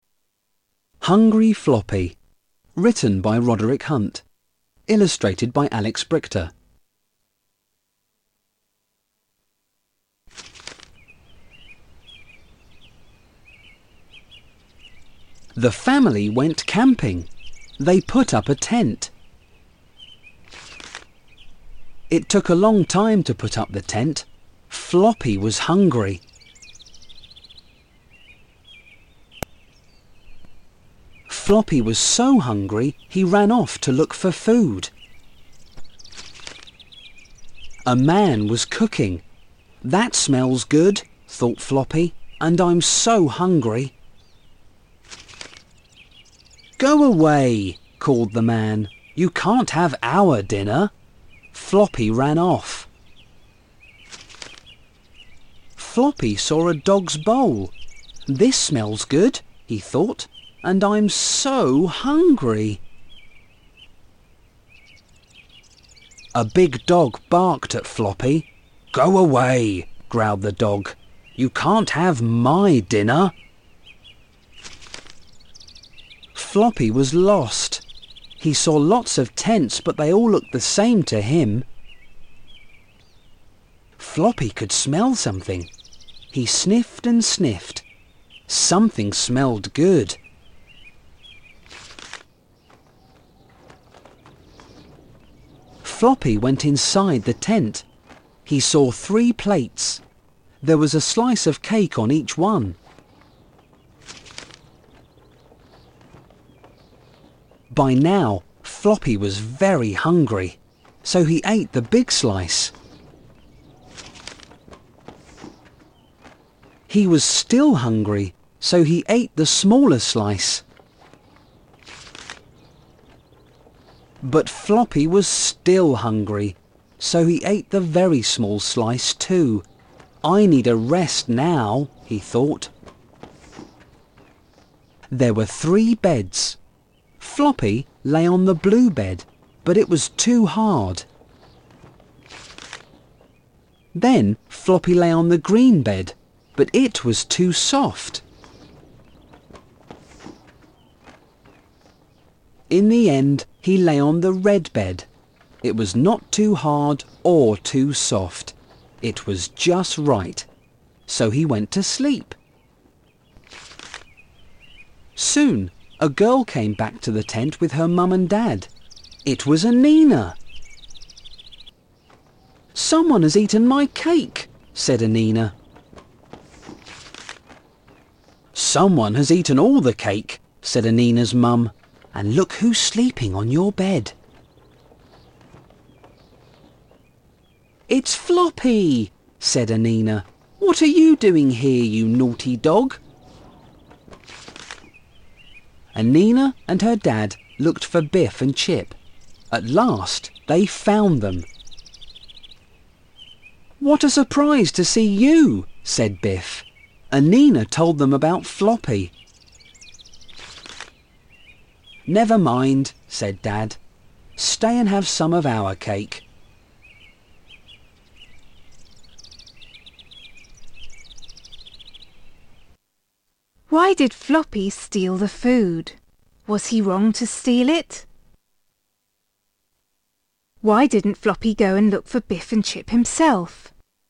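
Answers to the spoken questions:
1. Because he was very hungry
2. Because he was lost (all the tents looked the same to him)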